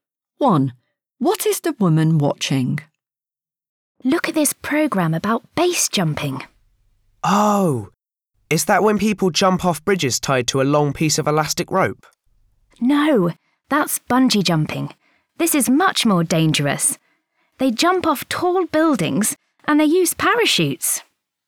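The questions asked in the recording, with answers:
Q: What is the woman watching?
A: a programme about base jumping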